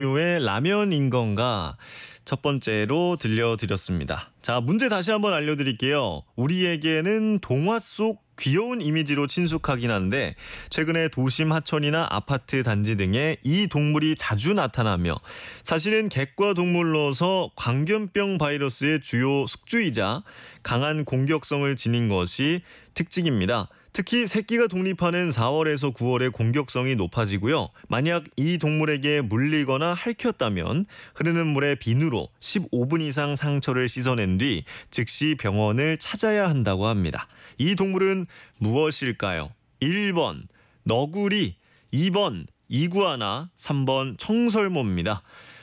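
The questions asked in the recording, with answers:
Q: 이 동물은 무엇일까요? 1번 너구리, 2번 이구아나, 3번 청설모입니다.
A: 1번: 너구리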